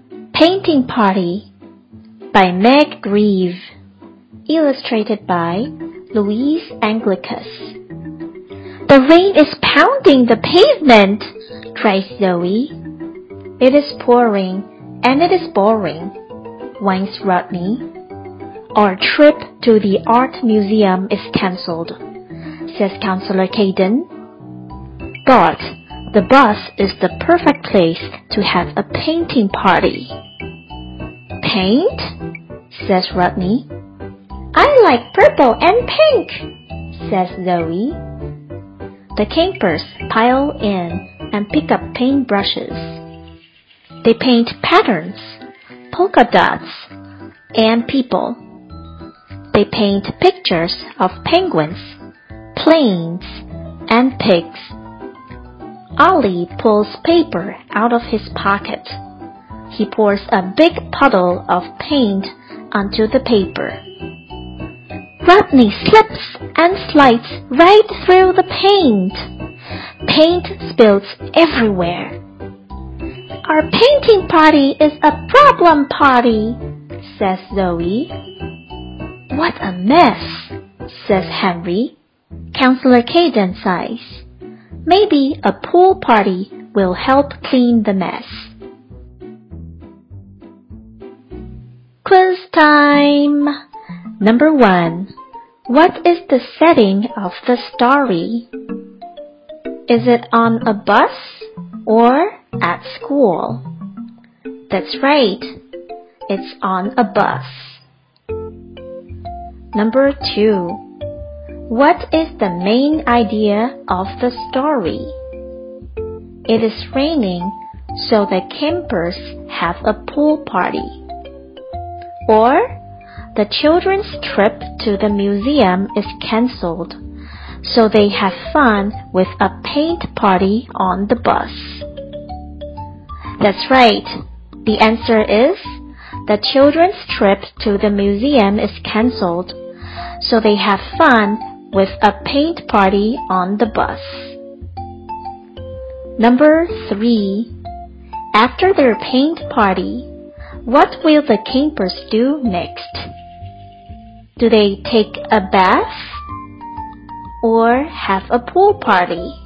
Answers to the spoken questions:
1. That's right. It's on a bus.
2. That's right. The answer is the children's trip to the museum is cancelled, so they have fun with a paint party on the bus.
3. That's right. The answer is have a pool party.